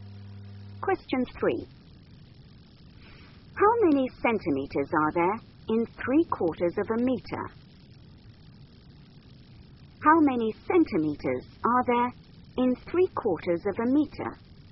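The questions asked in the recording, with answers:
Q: How many centimeters are there in 3/4 of a meter?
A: 75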